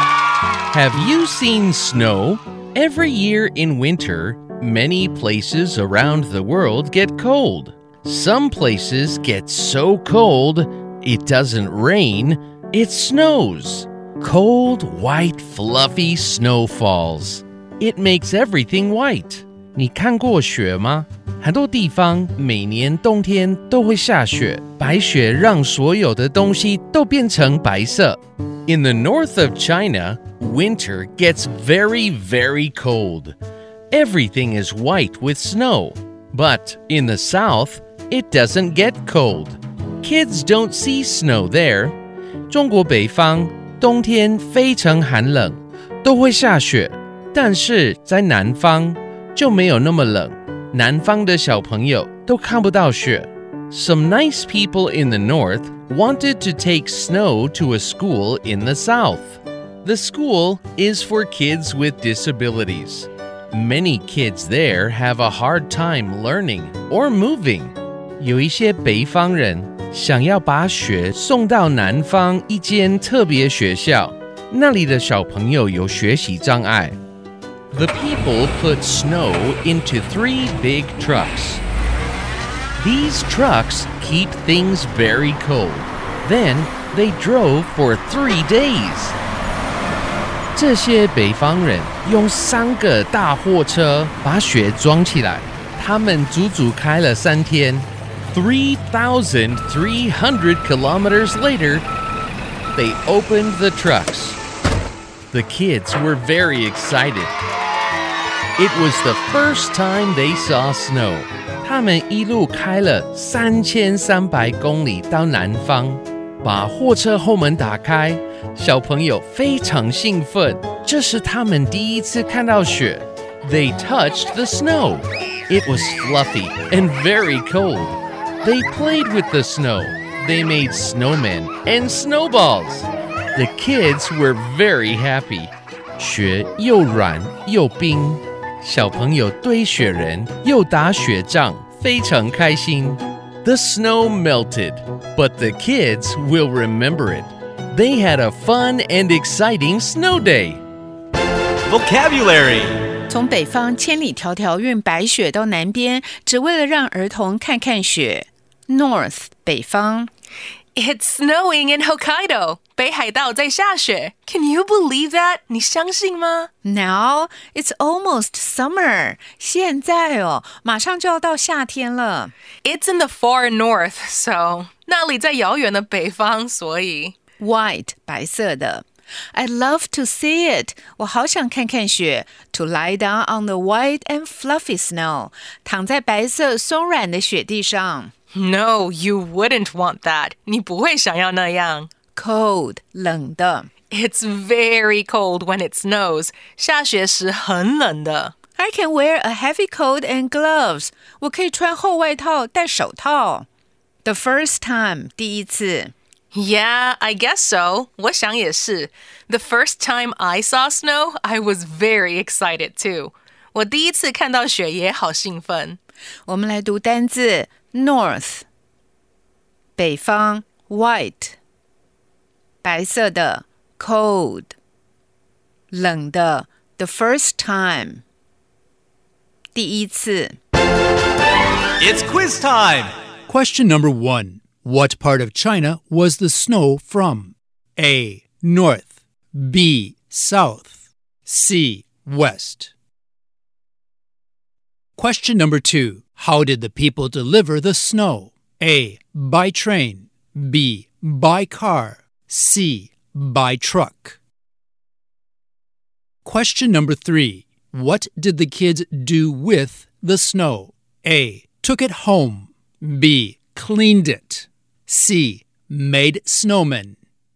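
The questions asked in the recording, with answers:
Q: What part of China was the snow from?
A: A: North

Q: How did the people deliver the snow?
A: C: By truck

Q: What did the kids do with the snow?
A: C: Made snowmen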